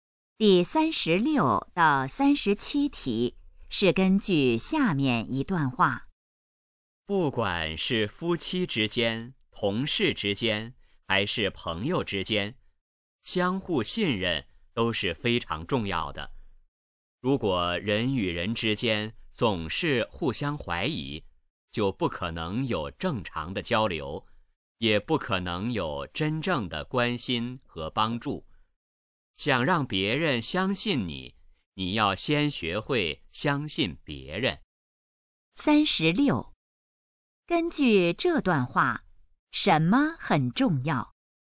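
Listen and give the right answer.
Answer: 相互信任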